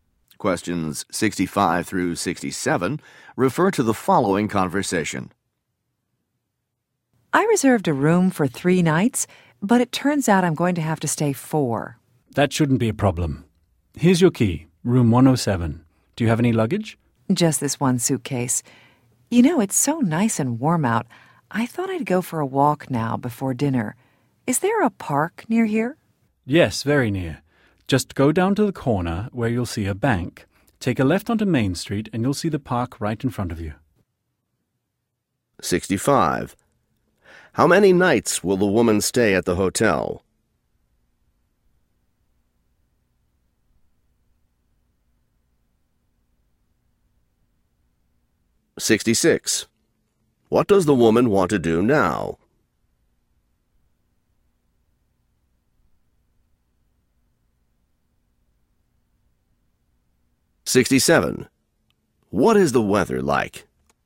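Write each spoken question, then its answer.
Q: How many nights will the woman stay at the hotel?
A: Four

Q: What does the woman want to do now?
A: Go for a walk

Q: What is the weather like?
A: Nice and warm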